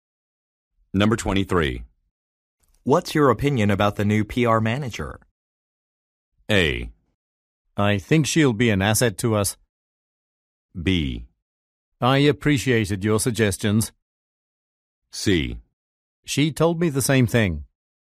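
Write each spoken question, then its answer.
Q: What's your opinion about the new PR manager?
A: A: I think she'll be an asset to us.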